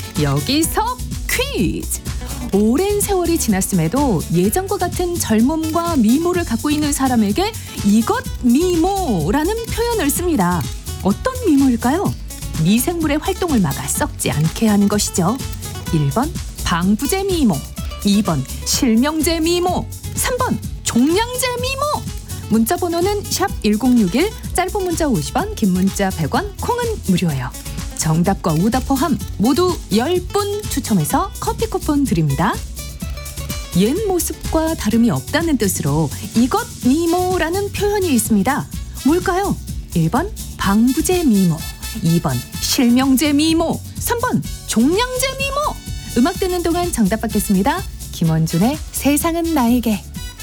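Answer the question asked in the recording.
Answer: 1: 방부제 미모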